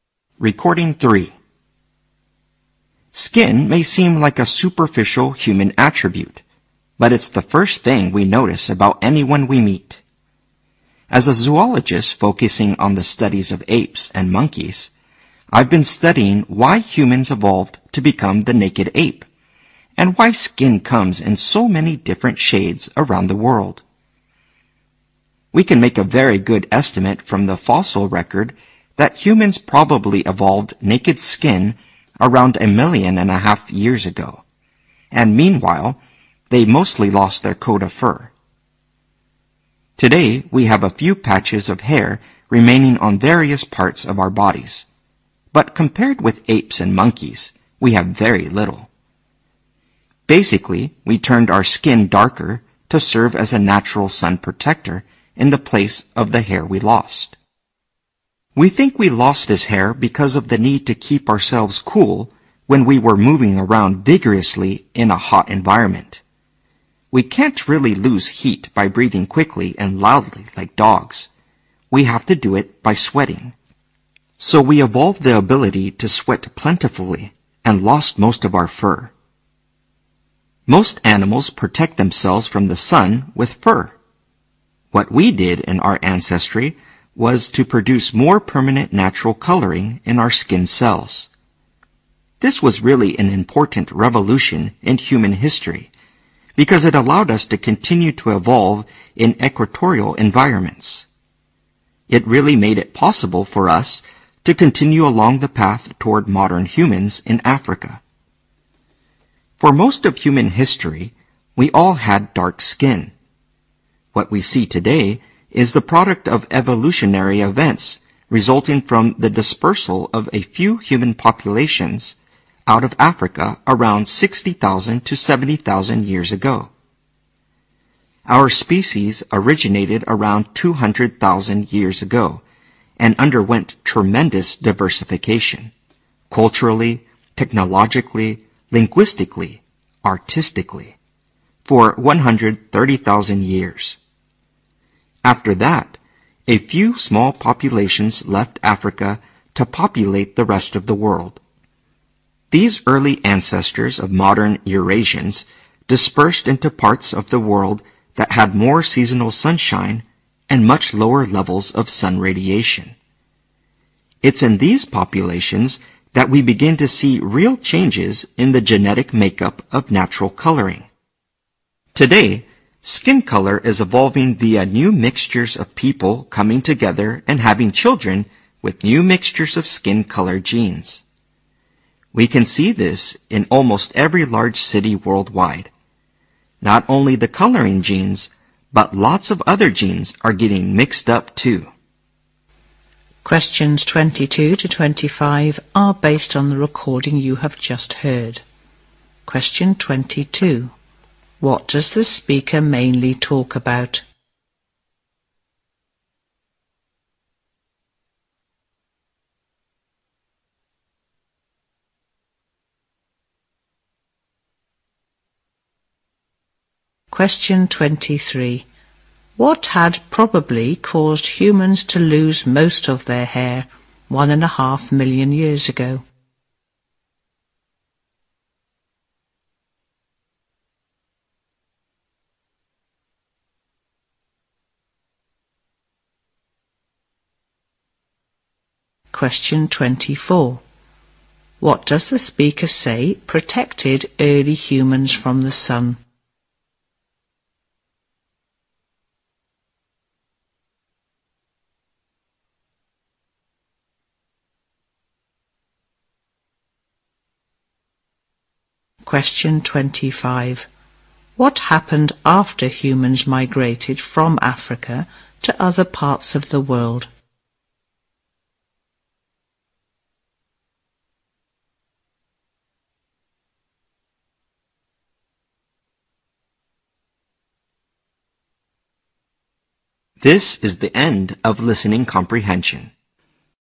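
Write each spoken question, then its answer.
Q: What does the speaker mainly talk about?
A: The evolution of human skin and its color

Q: What had probably caused humans to lose most of their hair 1.5 million years ago?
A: The need to keep cool while moving vigorously in a hot environment

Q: What does the speaker say protected early humans from the sun?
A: Darker skin coloring

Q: What happened after humans migrated from Africa to other parts of the world?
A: Their skin coloring genes began to change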